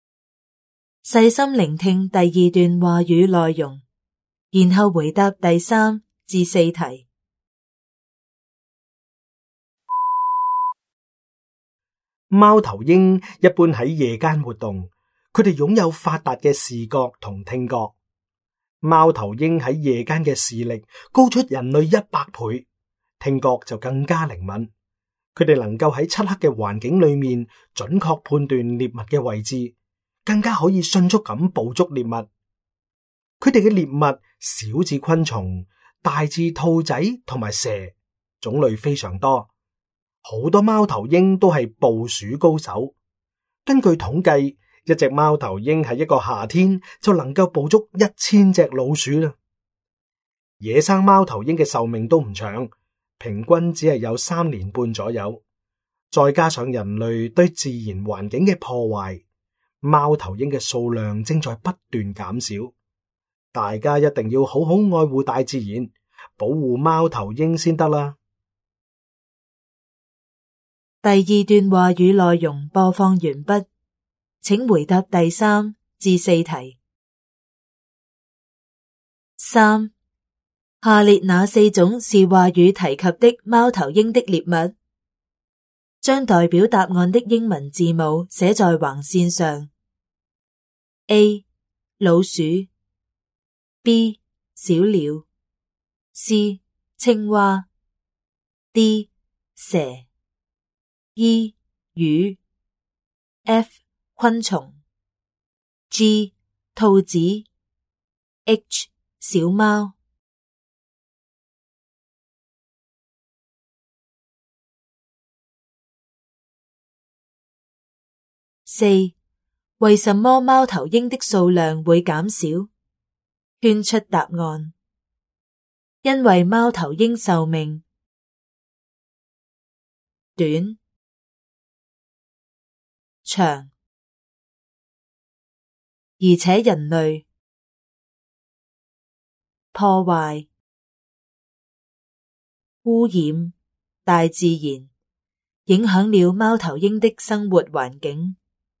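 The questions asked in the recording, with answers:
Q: 下列哪四种是话语提及的猫头鹰的猎物?将代表答案的英文字母写在横线上。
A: A: 老鼠, D: 蛇, F: 昆虫, G: 兔子

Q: 为什么猫头鹰的数量会减少?圈出答案。因为猫头鹰寿命 短 长,而且人类 破坏 污染大自然,影响了猫头鹰的生活环境。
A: 寿命短,人类破坏大自然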